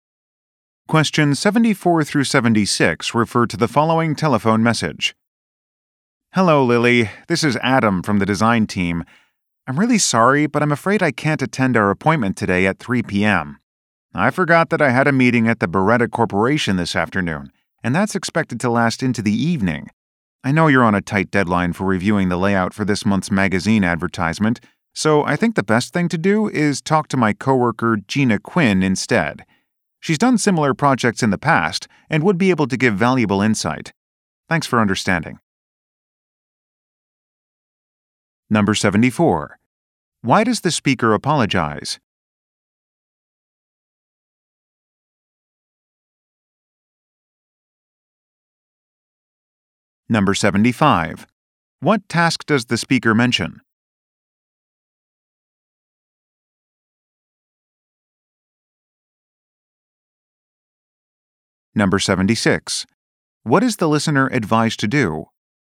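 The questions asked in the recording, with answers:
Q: Why does the speaker apologize?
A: He can't attend their appointment

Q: What task does the speaker mention?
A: Reviewing a magazine ad layout

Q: What is the listener advised to do?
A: Talk to Gina Quinn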